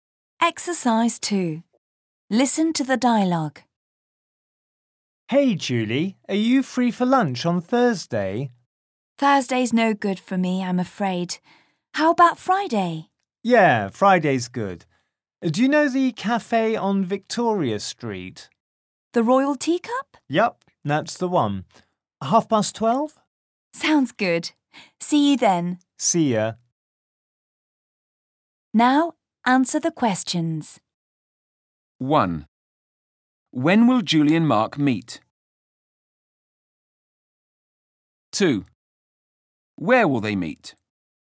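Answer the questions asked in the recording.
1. Friday at 12:30
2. At the Royal Teacup cafe on Victoria Street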